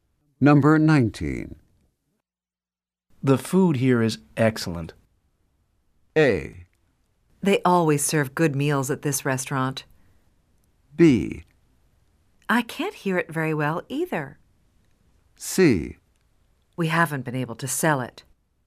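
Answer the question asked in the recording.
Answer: A: They always serve good meals at this restaurant.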